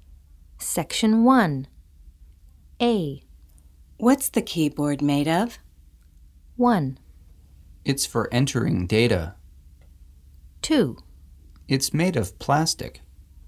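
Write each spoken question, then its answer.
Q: What's the keyboard made of?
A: 2: It's made of plastic.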